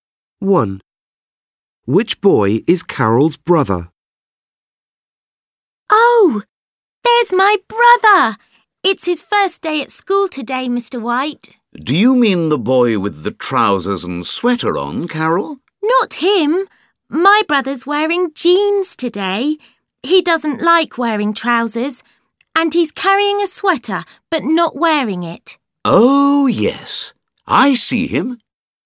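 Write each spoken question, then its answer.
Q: Which boy is Carol's brother?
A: The boy wearing jeans and carrying a sweater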